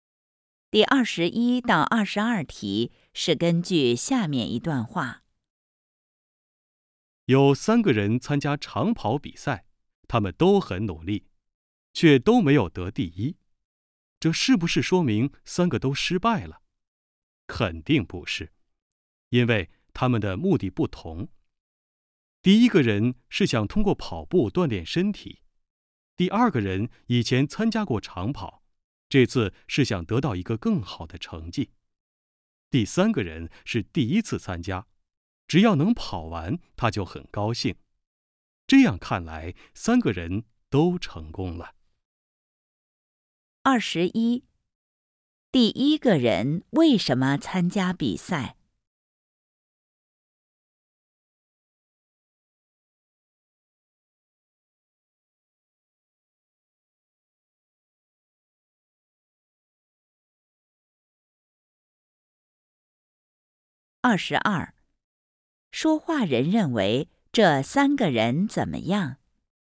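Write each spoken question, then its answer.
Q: 第一个人为什么参加比赛?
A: 想通过跑步锻炼身体

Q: 说话人认为这三个人怎么样?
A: 三个人都成功了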